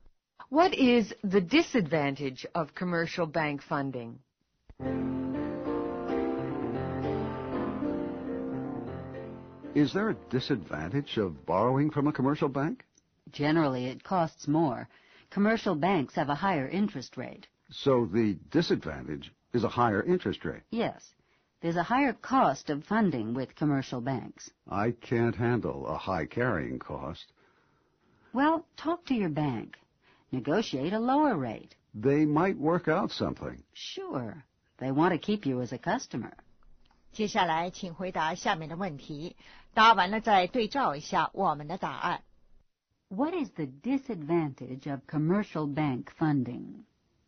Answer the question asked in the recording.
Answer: A higher interest rate.